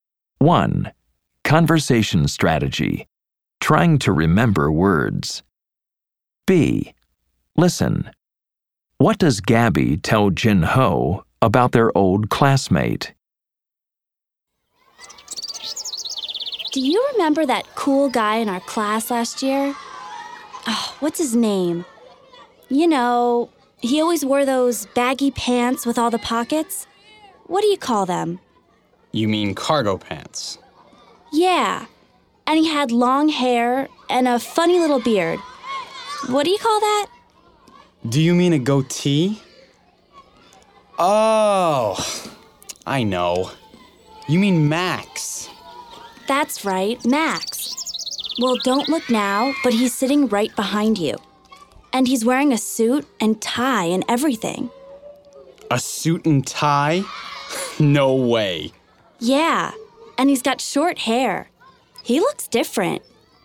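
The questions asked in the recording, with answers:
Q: What does Gabby tell Jin Ho about their old classmate?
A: Max is sitting right behind him, wearing a suit and tie, and he has short hair now and looks different.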